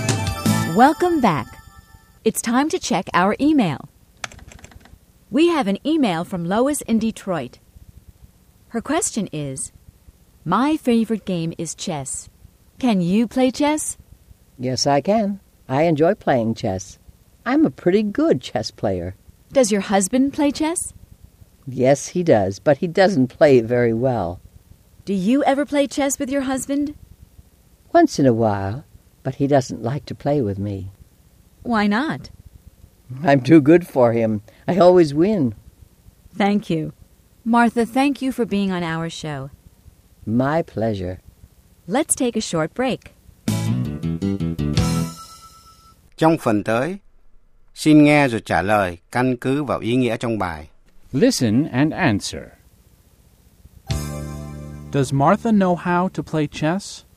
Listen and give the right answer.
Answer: Yes, she does.